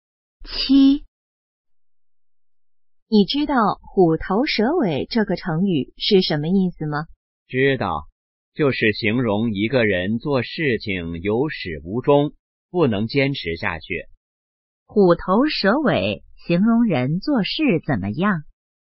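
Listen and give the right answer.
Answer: 有始无终,不能坚持下去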